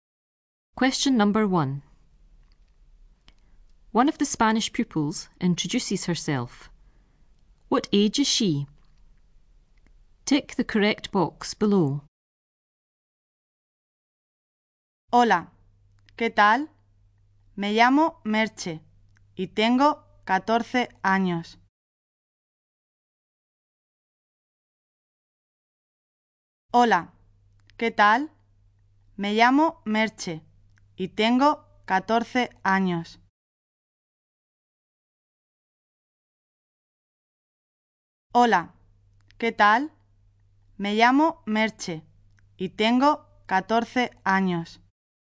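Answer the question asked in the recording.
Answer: 14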